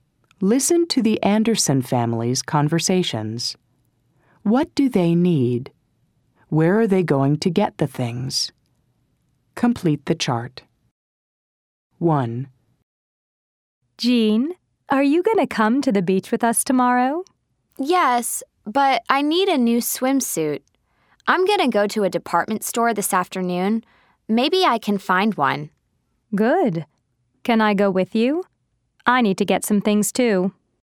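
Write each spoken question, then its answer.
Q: What do they need?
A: A new swimsuit

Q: Where are they going to get the things?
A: At a department store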